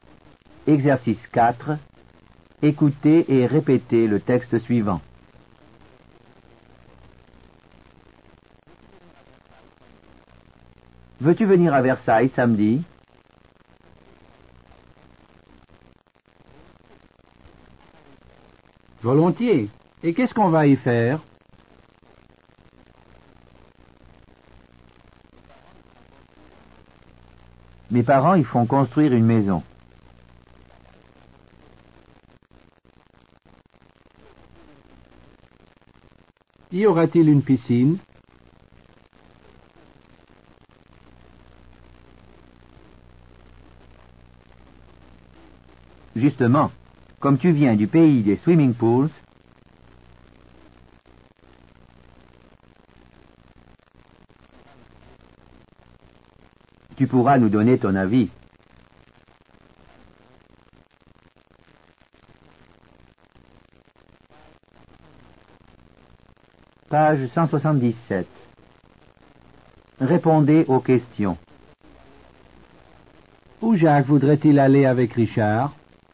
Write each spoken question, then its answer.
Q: Où Jacques voudrait-il aller avec Richard?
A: Il voudrait aller à Versailles.